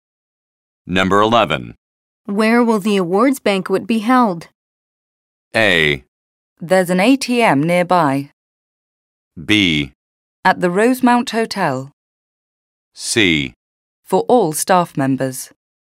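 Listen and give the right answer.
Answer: B: At the Rosemount Hotel.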